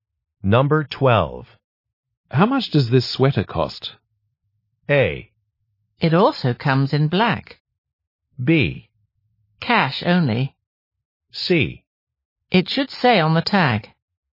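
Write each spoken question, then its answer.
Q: How much does this sweater cost?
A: C: It should say on the tag.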